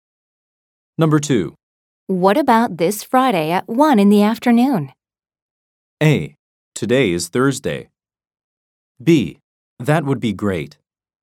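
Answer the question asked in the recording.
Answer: B: That would be great.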